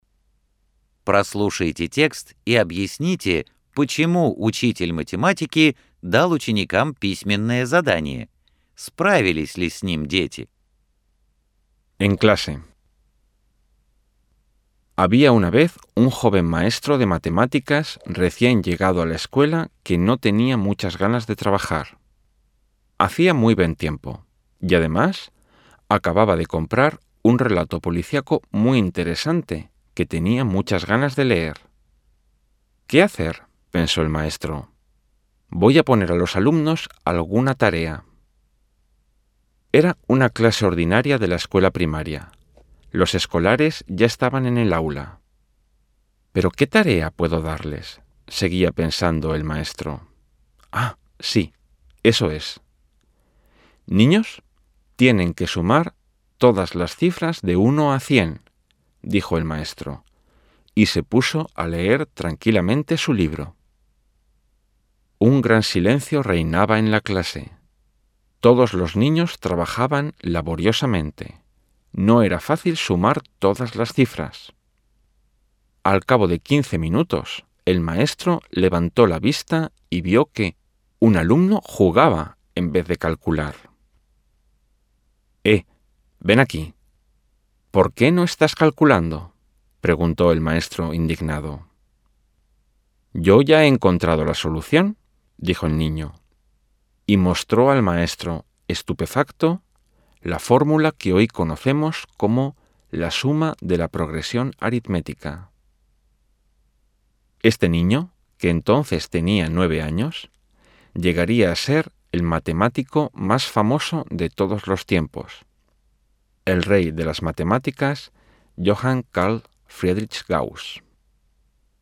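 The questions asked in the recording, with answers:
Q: Прослушайте текст и объясните, почему учитель математики дал ученикам письменное задание.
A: Ему не хотелось работать: была хорошая погода, и он хотел почитать новый интересный детектив

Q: Справились ли с ним дети?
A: Большинство детей ещё старательно считали, а один девятилетний мальчик (Гаусс) быстро решил задачу с помощью формулы суммы арифметической прогрессии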